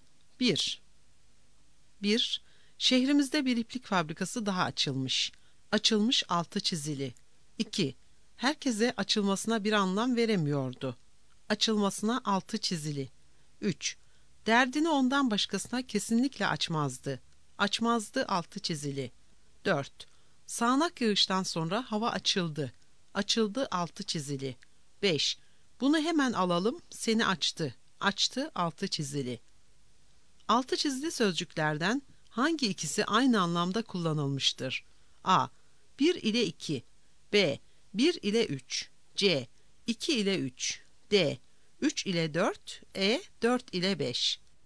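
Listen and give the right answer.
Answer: C: 2 ile 3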